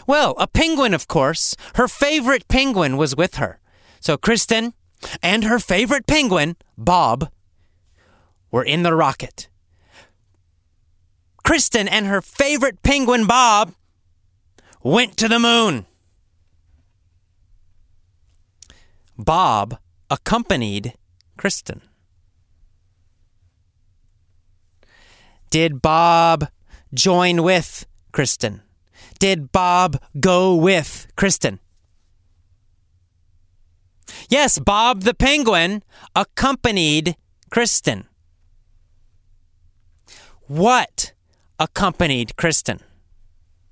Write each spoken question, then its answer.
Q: What accompanied Kristen?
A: A penguin. A penguin accompanied Kristen.